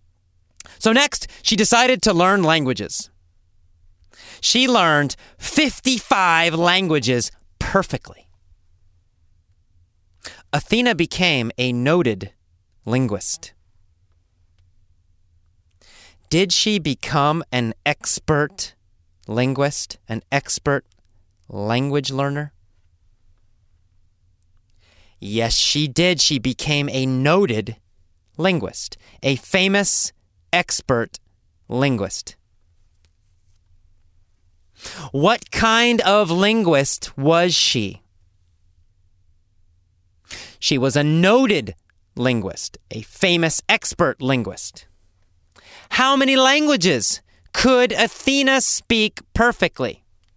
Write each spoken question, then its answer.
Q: How many languages could Athena speak perfectly?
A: 55. Athena could speak 55 languages perfectly.